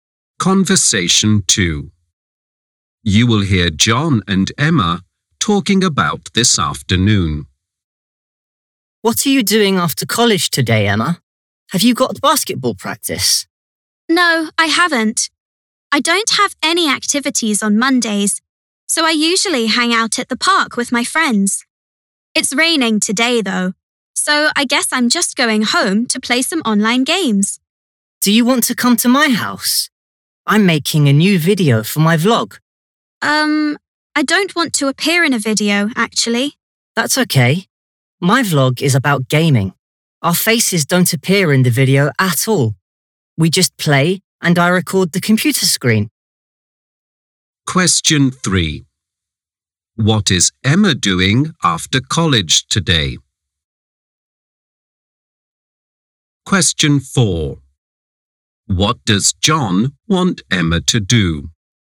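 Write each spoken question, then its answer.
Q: What is Emma doing after college today?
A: Going home to play online games.

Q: What does John want Emma to do?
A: Come to his house (while he makes a gaming video).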